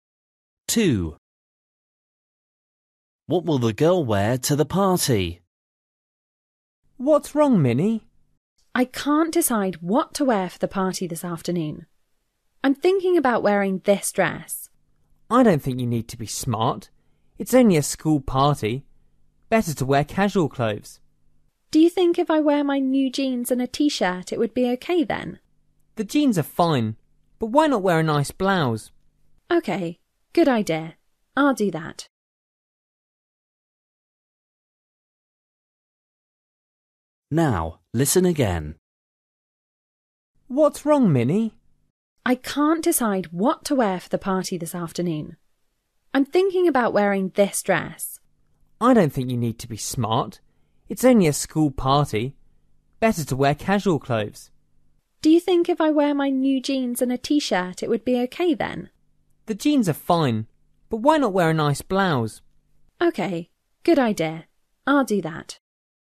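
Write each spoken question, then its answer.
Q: What will the girl wear to the party?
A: jeans and a nice blouse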